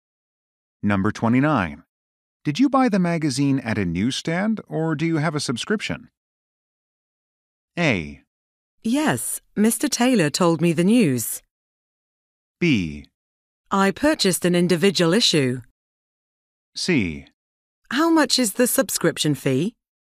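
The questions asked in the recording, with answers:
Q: Did you buy the magazine at a newsstand, or do you have a subscription?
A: B: I purchased an individual issue.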